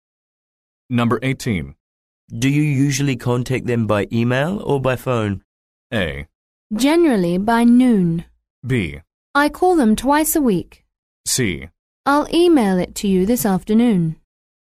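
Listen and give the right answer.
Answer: B: I call them twice a week.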